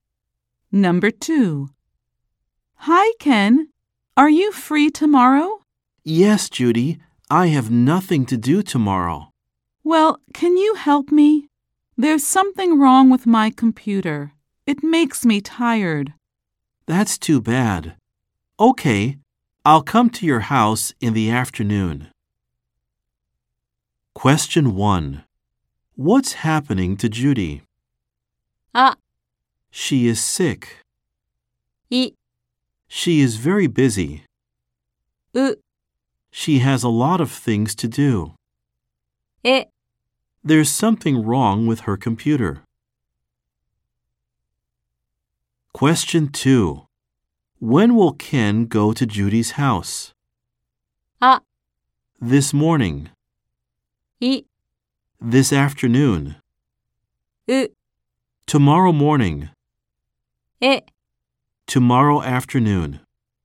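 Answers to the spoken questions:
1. E: There's something wrong with her computer.
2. E: Tomorrow afternoon.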